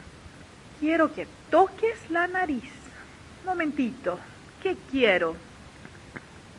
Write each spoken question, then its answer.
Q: Momentito, ¿qué quiero?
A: Usted quiere que yo toque la nariz.